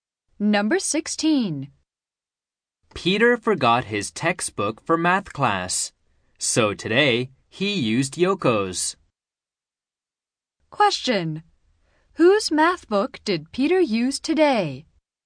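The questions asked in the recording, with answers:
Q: Whose math book did Peter use today?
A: Yoko's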